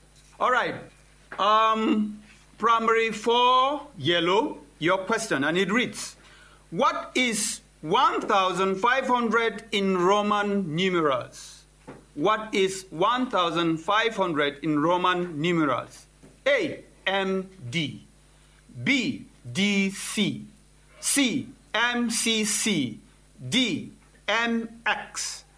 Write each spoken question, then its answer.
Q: what is 1,500 in Roman numerals?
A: The answer is A, MD.